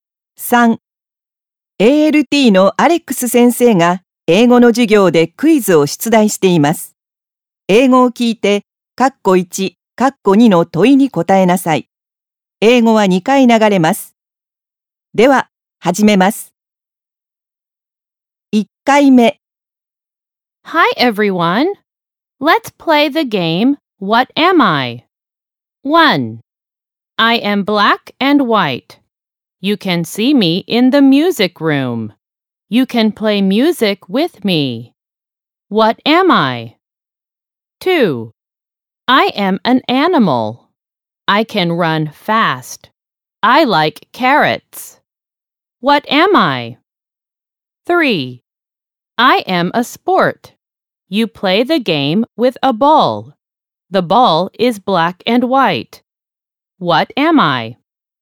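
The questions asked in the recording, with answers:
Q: What am I?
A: a piano

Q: What am I?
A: soccer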